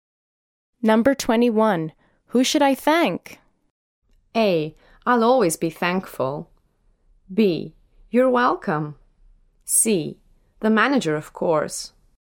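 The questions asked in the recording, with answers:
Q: Who should I thank?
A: C: The manager, of course.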